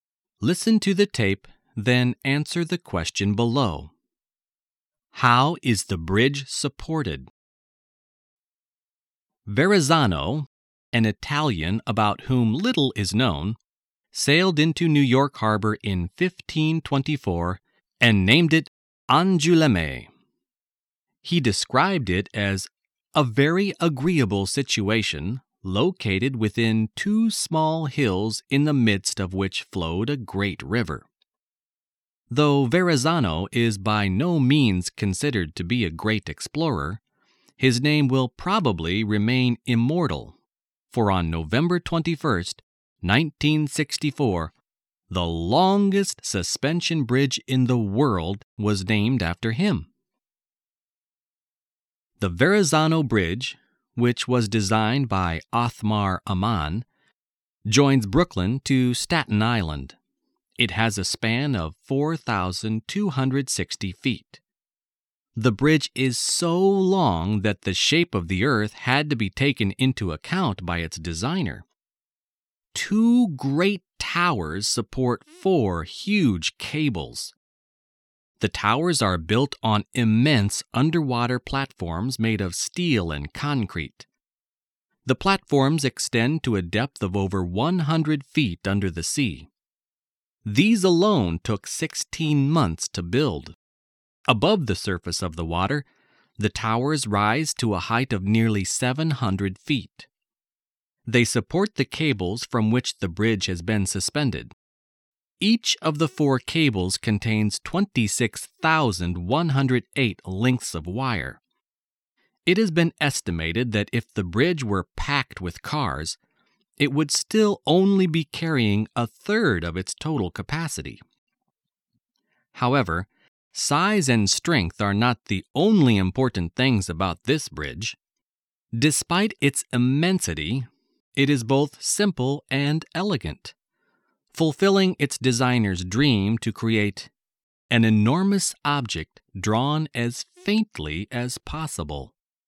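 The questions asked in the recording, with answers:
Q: How is the bridge supported?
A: By two great towers that support four huge cables; the towers stand on huge steel and concrete platforms under the water.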